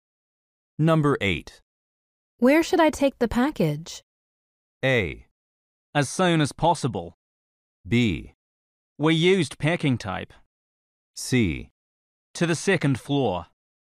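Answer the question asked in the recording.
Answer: C: To the second floor.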